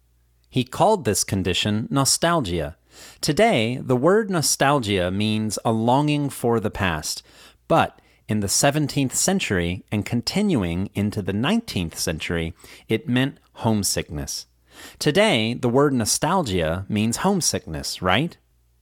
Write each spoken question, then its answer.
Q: Today, the word nostalgia means homesickness, right?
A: No. Today, the word nostalgia doesn't mean homesickness.